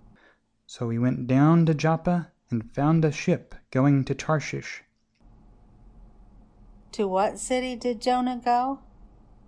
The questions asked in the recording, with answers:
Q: To what city did Jonah go?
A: Jonah went to Joppa.